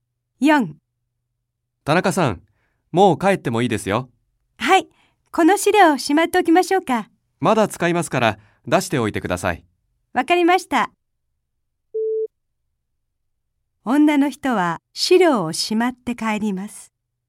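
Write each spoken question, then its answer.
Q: 女の人は資料をしまって帰ります。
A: ×(正しくない)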